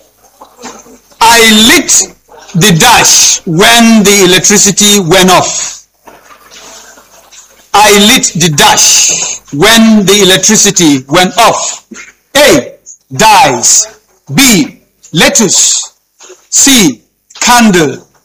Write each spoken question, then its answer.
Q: I lit the dash when the electricity went off.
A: C. Candle.